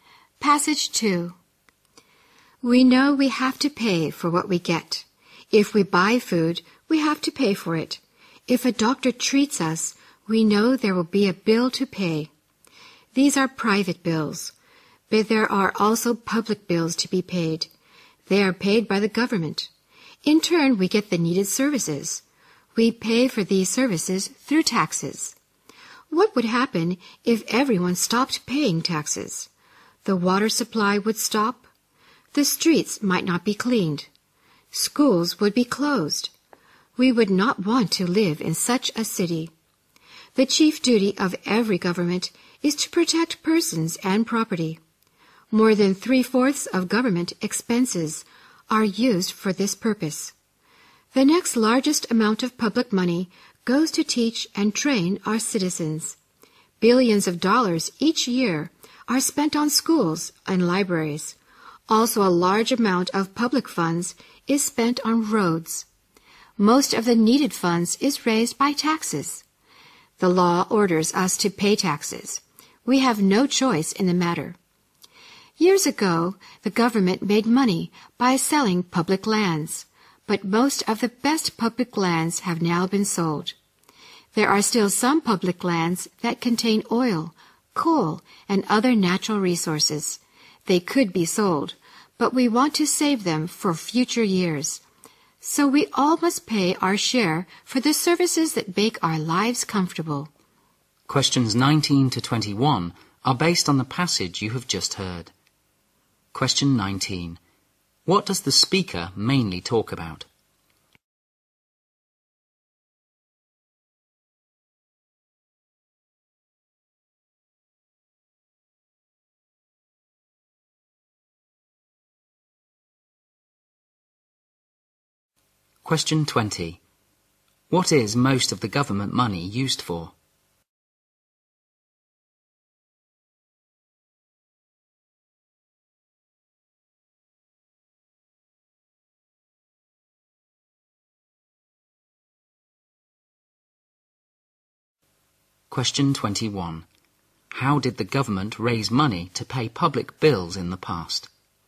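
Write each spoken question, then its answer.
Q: What does the speaker mainly talk about?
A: Why we must pay taxes for public services

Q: What is most of the government money used for?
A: Protecting persons and property

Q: How did the government raise money to pay public bills in the past?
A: By selling public lands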